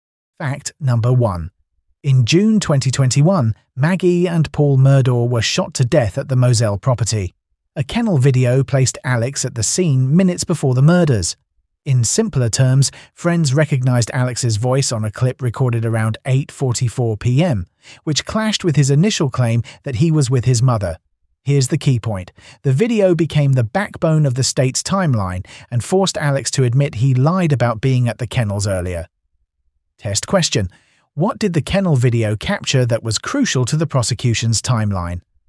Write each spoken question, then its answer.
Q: What did the kennel video capture that was crucial to the prosecution's timeline?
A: Alex's voice.